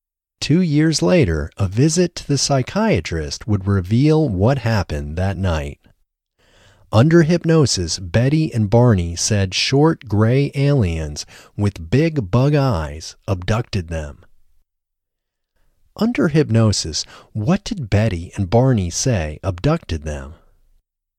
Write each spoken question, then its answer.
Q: Under hypnosis, what did Betty and Barney say abducted them?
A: Under hypnosis, Betty and Barney said short gray aliens with big bug eyes abducted them.